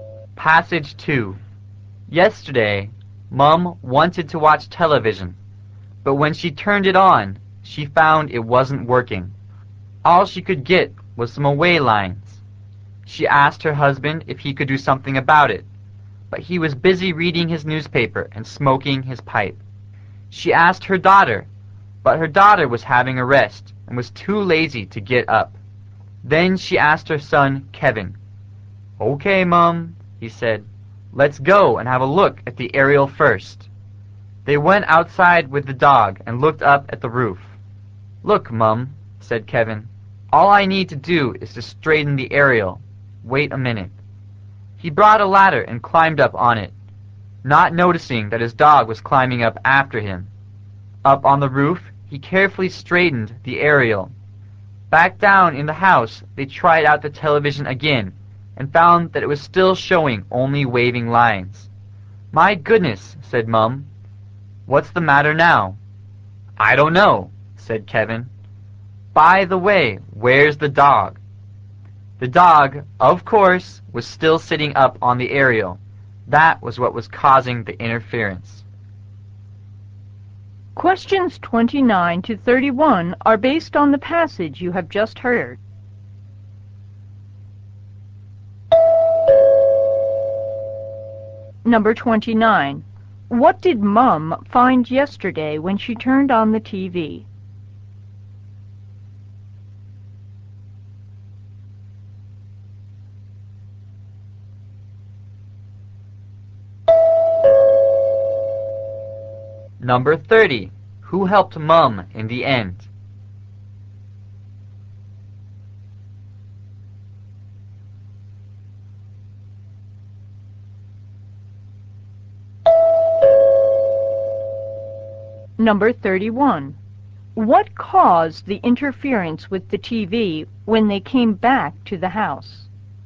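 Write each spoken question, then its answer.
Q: What did Mum find yesterday when she turned on the TV?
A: It wasn't working; it showed only waving lines

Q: Who helped Mum in the end?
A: Her son Kevin

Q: What caused the interference with the TV when they came back to the house?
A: The dog sitting on the aerial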